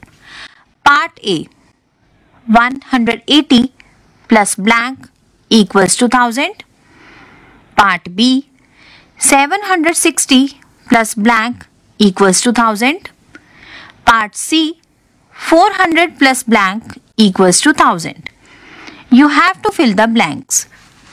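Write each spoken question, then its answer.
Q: Part A. 180 plus blank equals to 1000.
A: 820

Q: Part B. 760 plus blank equals to 1000.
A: 240

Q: Part C. 400 plus blank equals to 1000.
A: 600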